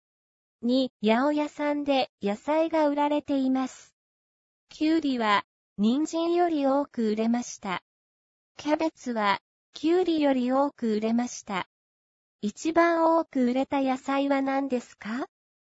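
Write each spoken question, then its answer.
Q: 一番多く売れた野菜は何ですか?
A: キャベツ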